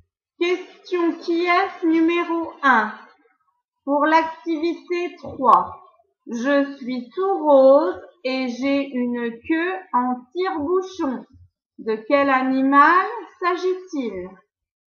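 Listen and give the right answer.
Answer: le cochon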